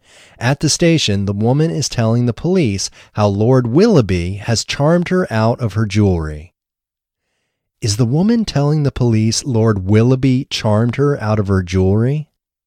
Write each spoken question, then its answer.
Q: Is the woman telling the police Lord Willoughby charmed her out of her jewelry?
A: Yes, the woman is telling the police how Lord Willoughby charmed her out of her jewelry.